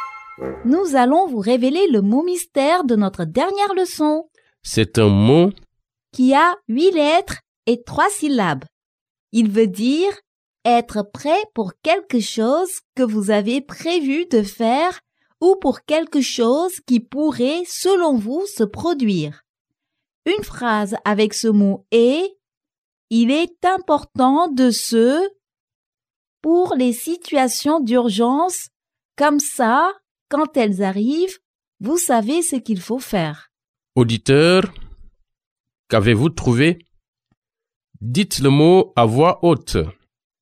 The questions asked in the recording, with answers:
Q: Auditeur, qu'avez-vous trouvé?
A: Le mot mystère d'aujourd'hui est « préparer ».